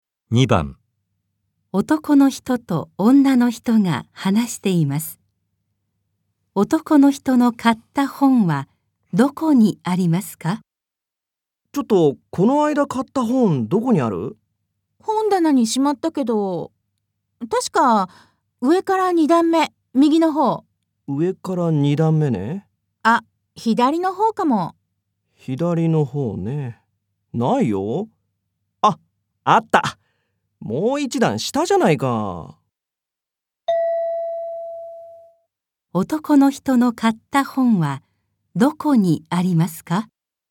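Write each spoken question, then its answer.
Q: 男の人の買った本はどこにありますか?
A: 本棚の上から3段目の左の方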